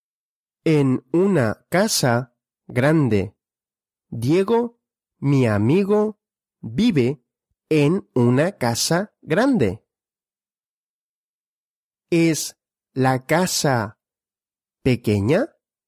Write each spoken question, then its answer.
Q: ¿Es la casa pequeña?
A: No, la casa no es pequeña.